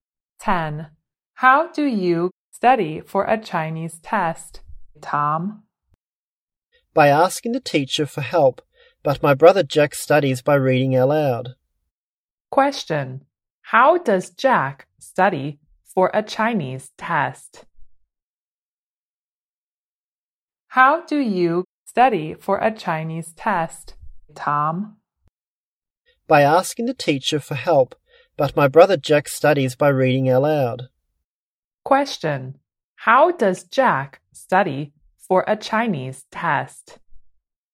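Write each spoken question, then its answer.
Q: Question, how does Jack study for a Chinese test?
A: By reading aloud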